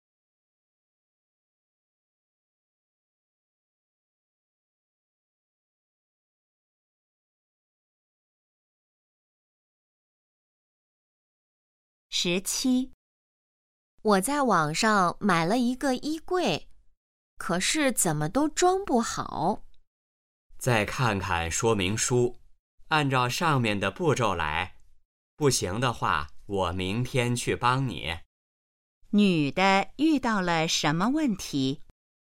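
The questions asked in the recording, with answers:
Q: 女的遇到了什么问题?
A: 衣柜装不好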